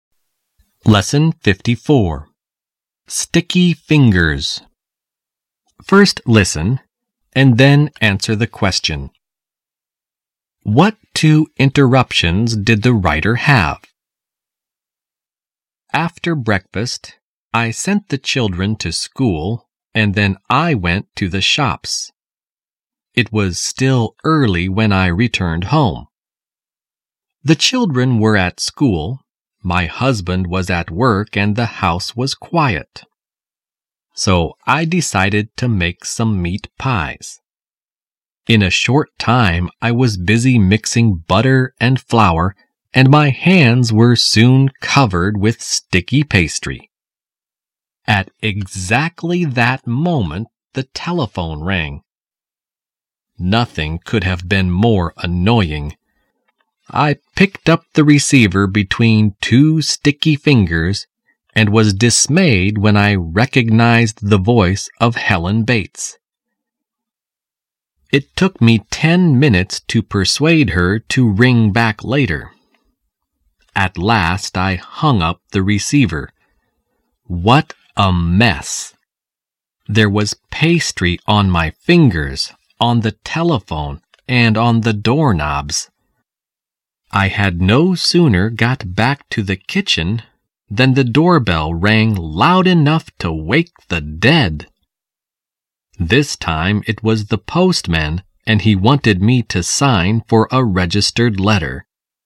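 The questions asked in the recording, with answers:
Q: What two interruptions did the writer have?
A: A telephone call from Helen Bates and the postman ringing the doorbell with a registered letter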